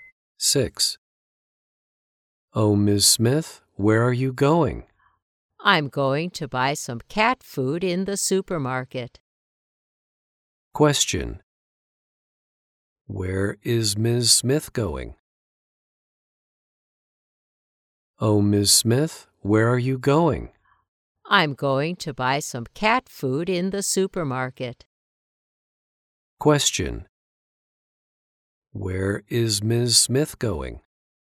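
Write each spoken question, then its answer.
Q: Where is Ms. Smith going?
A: To the supermarket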